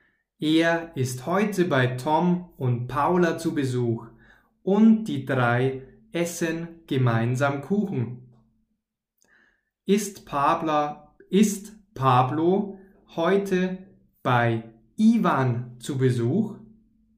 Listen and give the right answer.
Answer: Nein, er ist nicht bei Ivan zu Besuch.